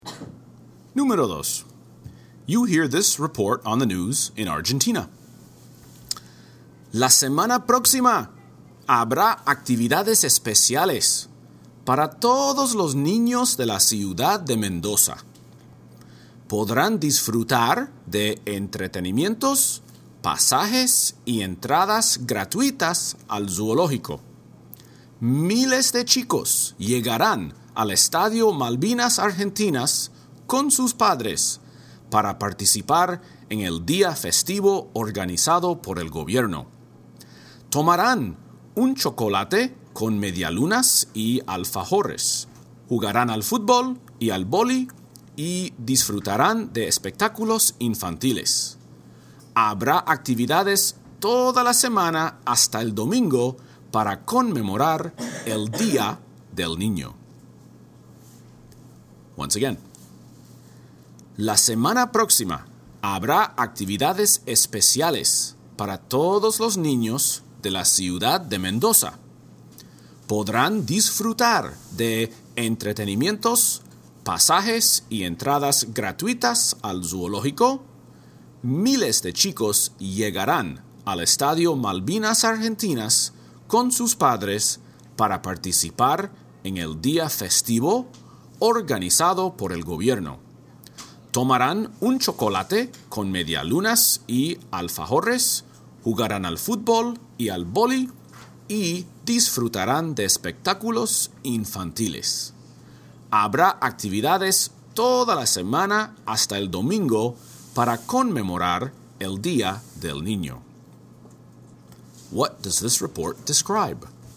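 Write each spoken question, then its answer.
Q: What does this report describe?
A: Special activities for children in Mendoza to celebrate Children's Day (Día del Niño)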